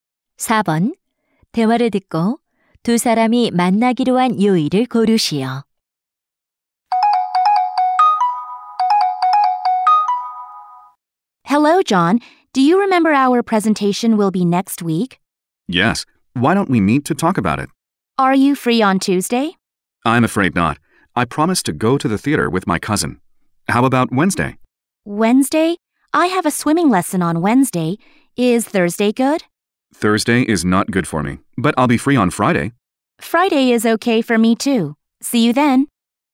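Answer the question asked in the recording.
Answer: 금요일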